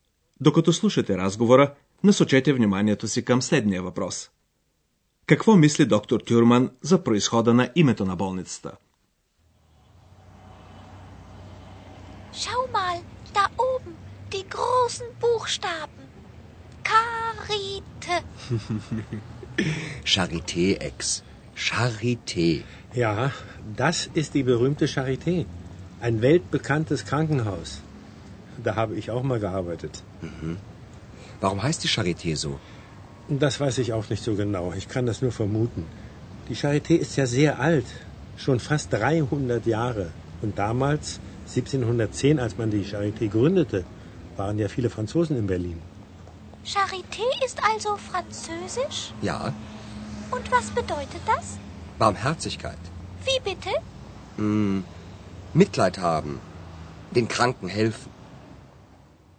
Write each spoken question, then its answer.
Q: Какво мисли доктор Тюрман за происхода на името на болницата?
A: Шарите е френска дума. Болницата е била основана преди 300 години.